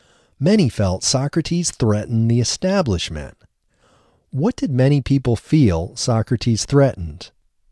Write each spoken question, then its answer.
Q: What did many people feel Socrates threatened?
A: Many people felt Socrates threatened the establishment.